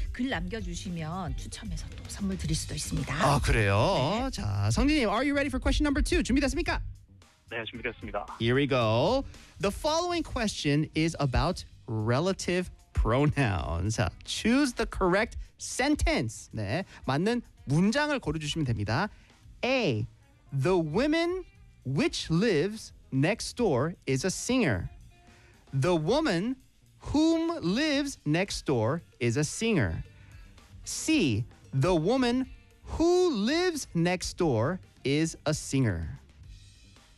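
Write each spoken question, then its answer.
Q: Choose the correct sentence.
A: C: The woman who lives next door is a singer.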